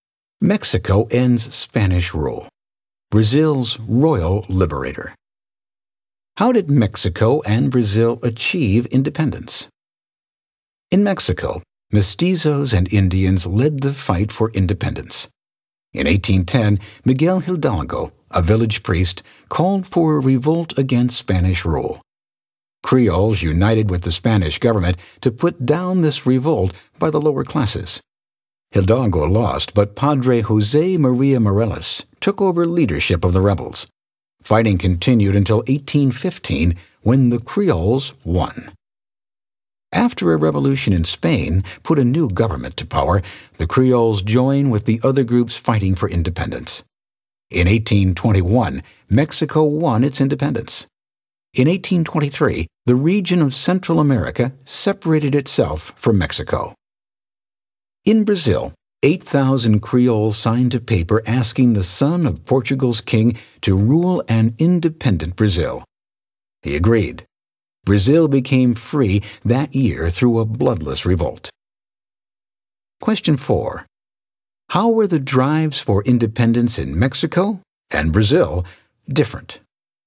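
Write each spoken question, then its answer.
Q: How were the drives for independence in Mexico and Brazil different?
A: Mexico's independence came through long fighting begun by mestizos and Indians, while Brazil's came through a bloodless revolt led by Creoles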